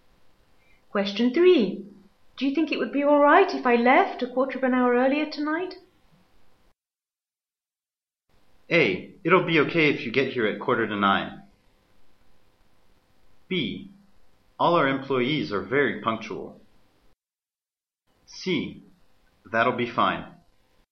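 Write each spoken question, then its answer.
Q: Do you think it would be all right if I left a quarter of an hour earlier tonight?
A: C: That'll be fine.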